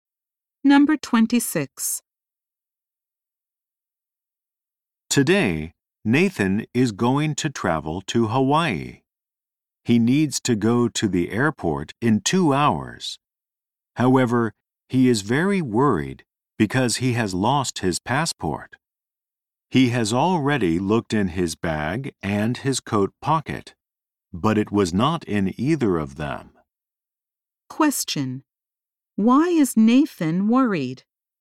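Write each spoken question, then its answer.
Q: Why is Nathan worried?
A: He has lost his passport.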